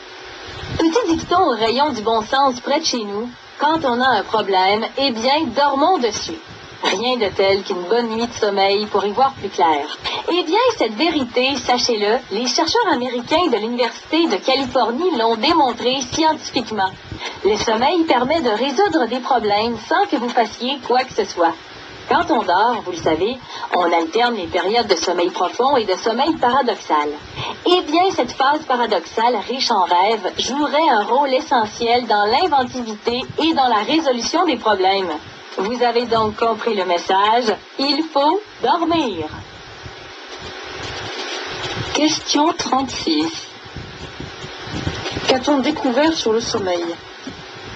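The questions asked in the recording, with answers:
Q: Qu'a-t-on découvert sur le sommeil?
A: Le sommeil, surtout la phase paradoxale riche en rêves, aide à résoudre des problèmes.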